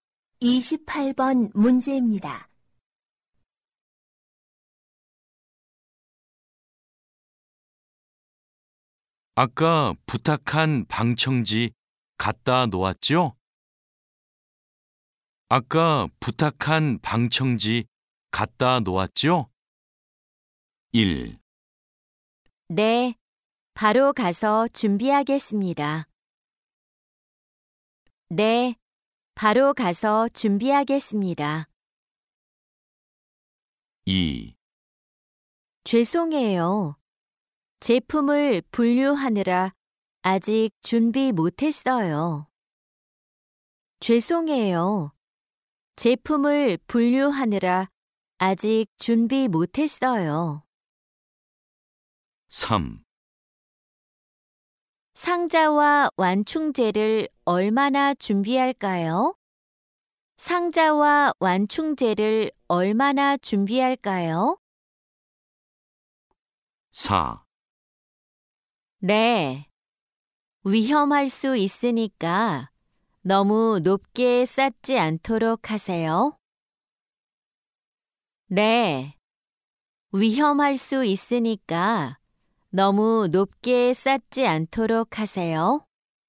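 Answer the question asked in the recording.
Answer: 2: 죄송해요. 제품을 분류하느라 아직 준비 못했어요.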